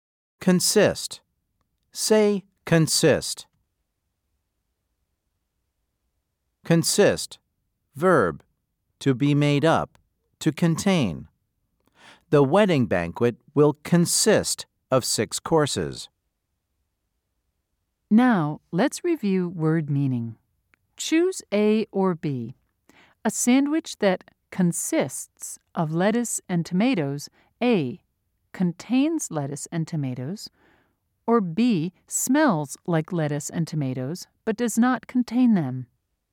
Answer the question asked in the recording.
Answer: If you said A, you were correct.